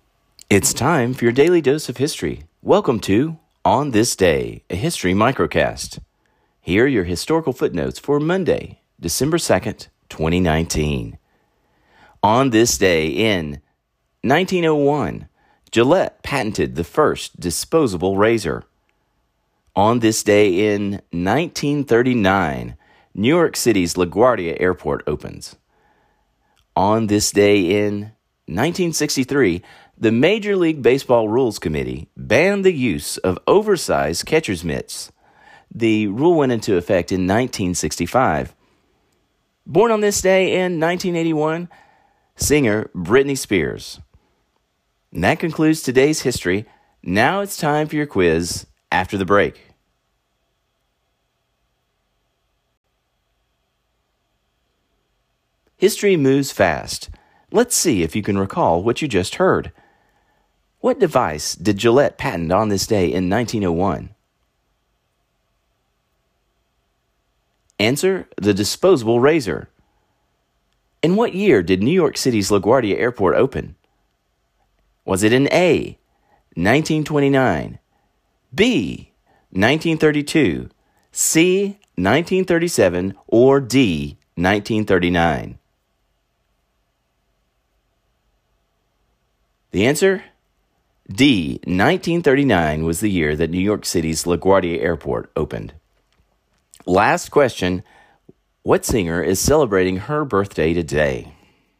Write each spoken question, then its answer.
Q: What device did Gillette patent on this day in 1901?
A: Answer, the disposable razor.